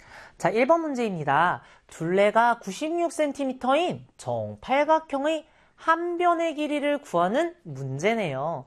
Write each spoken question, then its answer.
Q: 둘레가 96cm인 정팔각형의 한 변의 길이를 구하는 문제네요.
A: 12cm다.